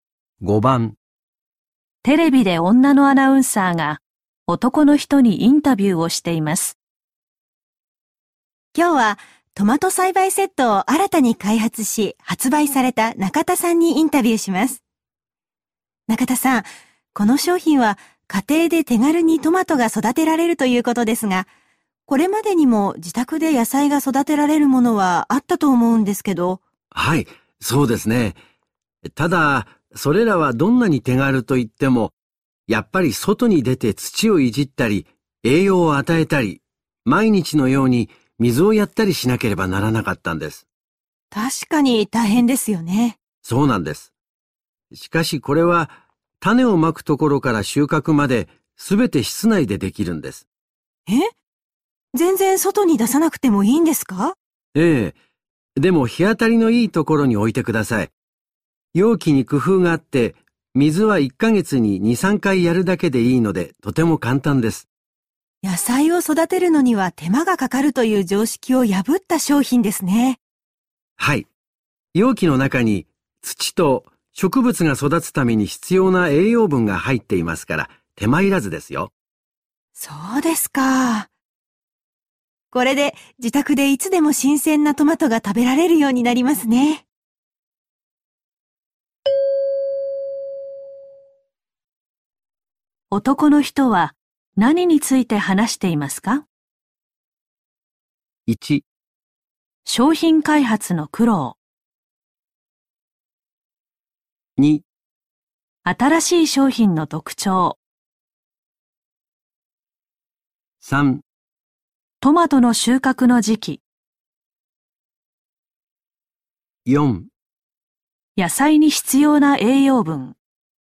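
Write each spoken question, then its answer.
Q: 男の人は何について話していますか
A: 2: 新しい商品の特徴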